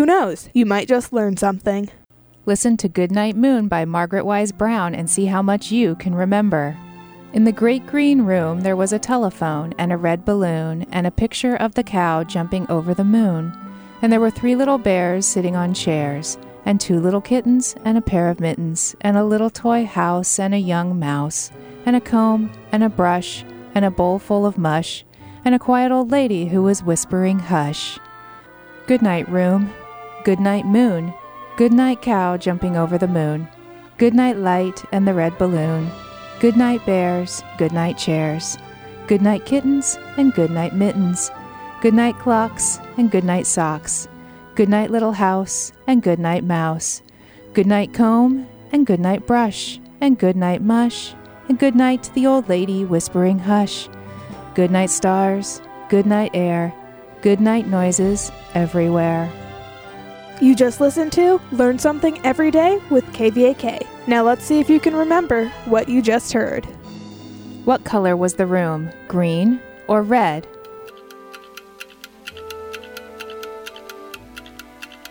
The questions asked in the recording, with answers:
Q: What color was the room? Green or red?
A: The room was green.